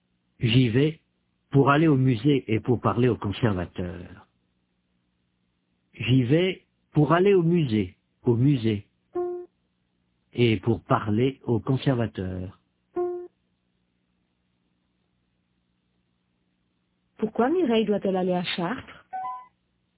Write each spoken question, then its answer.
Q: Pourquoi Mireille doit-elle aller à Chartres?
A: Pour aller au musée et pour parler au conservateur.